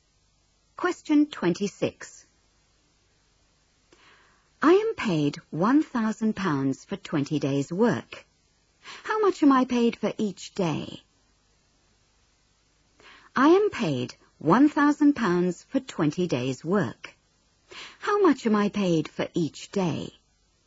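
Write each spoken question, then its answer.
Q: How much am I paid for each day?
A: £50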